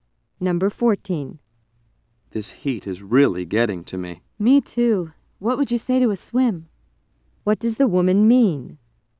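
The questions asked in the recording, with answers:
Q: What does the woman mean?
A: She suggests going for a swim.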